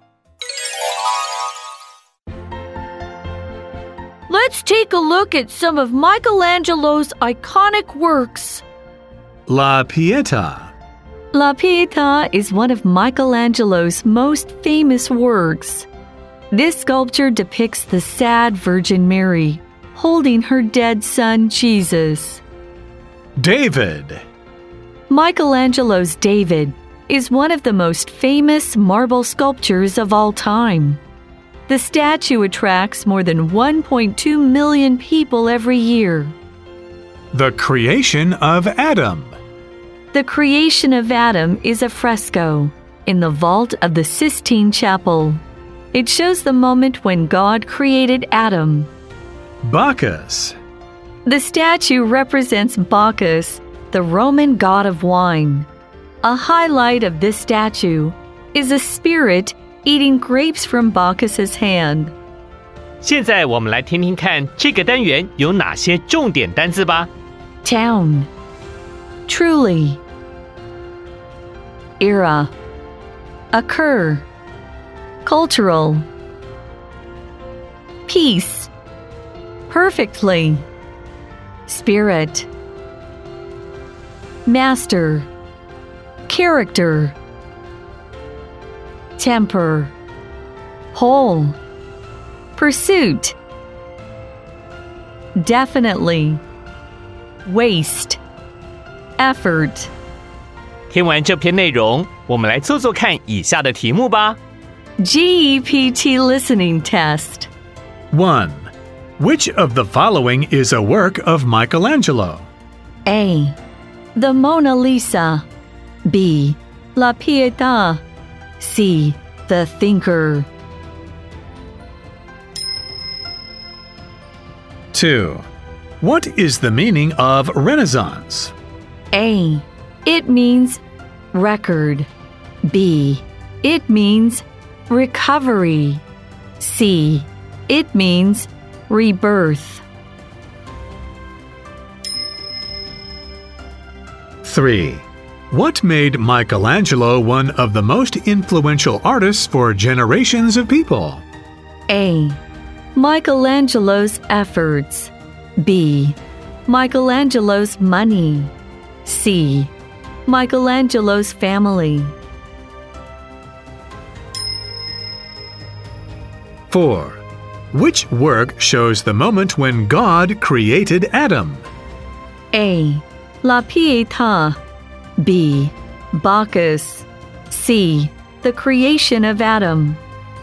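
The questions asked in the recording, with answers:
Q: Which of the following is a work of Michelangelo?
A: B: La Pietà.

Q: Which work shows the moment when God created Adam?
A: C: The creation of Adam.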